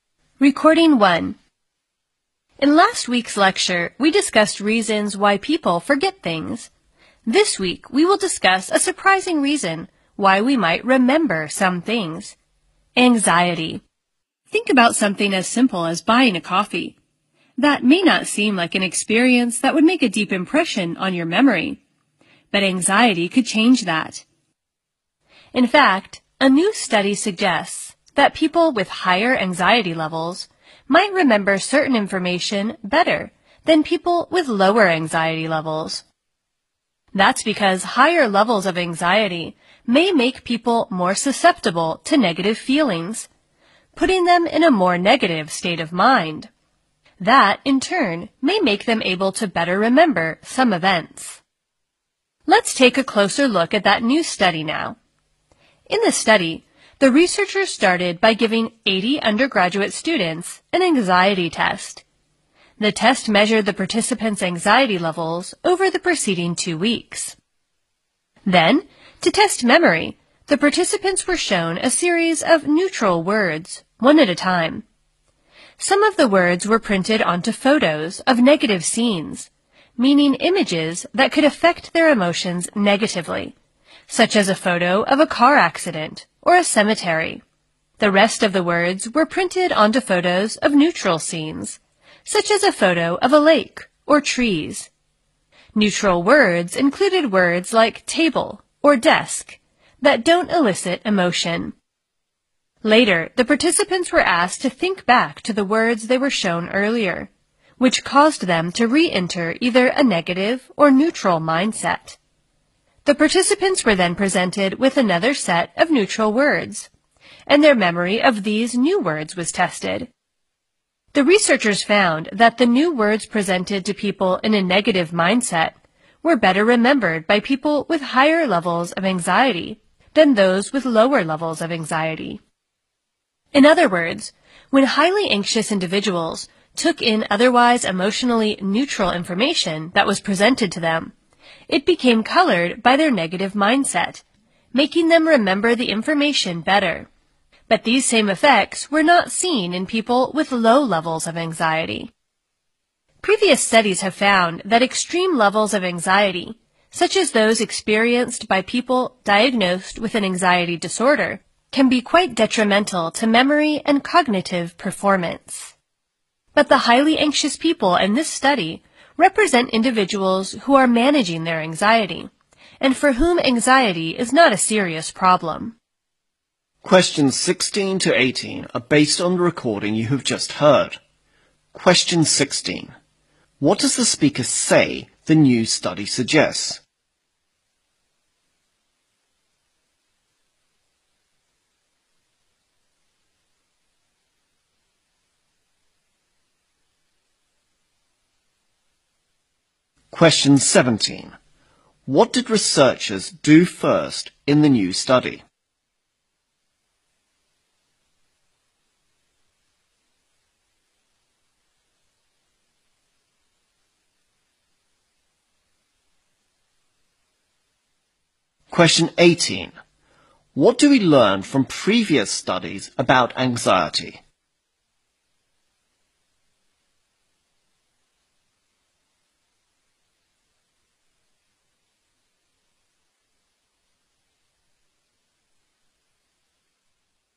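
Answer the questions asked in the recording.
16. People with higher anxiety may remember certain information better.
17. Gave the students an anxiety test.
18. Extreme anxiety can be detrimental to memory and cognitive performance.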